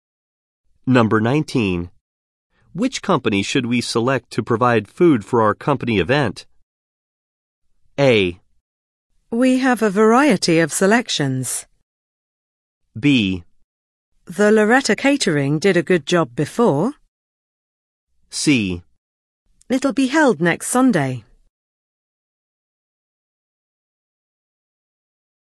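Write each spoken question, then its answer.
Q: Which company should we select to provide food for our company event?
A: B: The Loretta Catering did a good job before.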